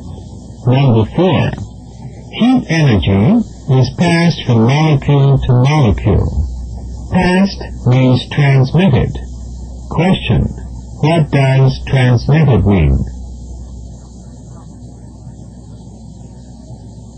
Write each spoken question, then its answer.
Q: what does transmitted mean?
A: Passed.